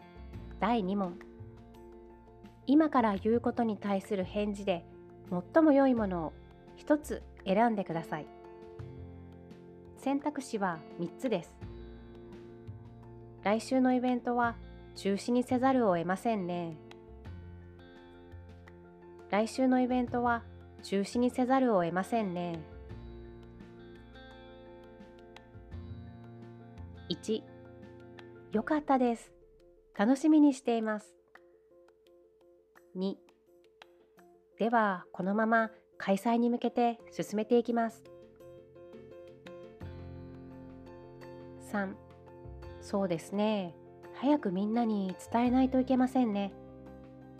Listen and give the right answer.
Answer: 正解は3番です。